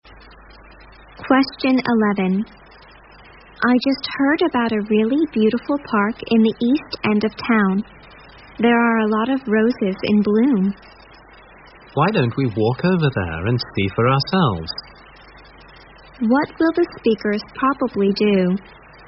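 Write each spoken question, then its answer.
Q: What will the speakers probably do?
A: Walk to the park to see the roses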